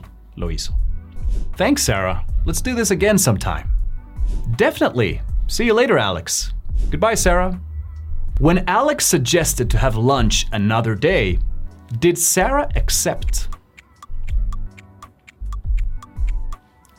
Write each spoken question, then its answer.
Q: When Alex suggested to have lunch another day, did Sarah accept?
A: Yes, she did.